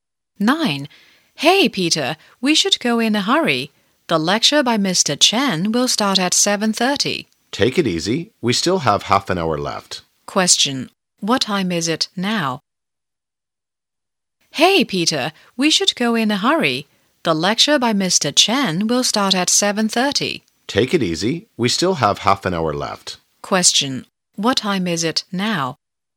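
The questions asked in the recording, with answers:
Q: What time is it now?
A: 7:00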